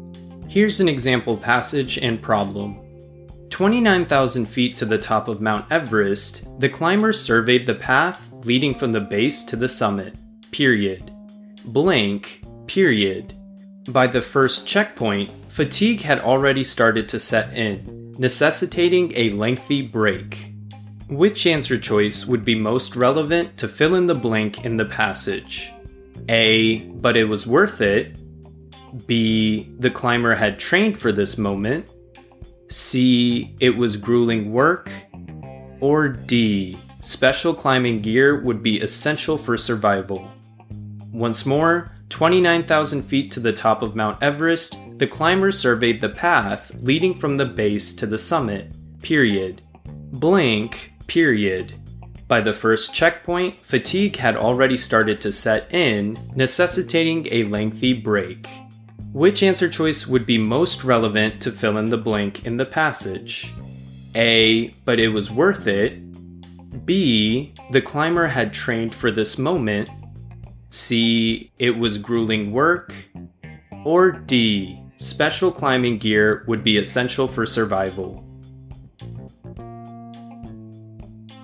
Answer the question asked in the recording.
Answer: Answer choice C, it was grueling work, is the correct answer here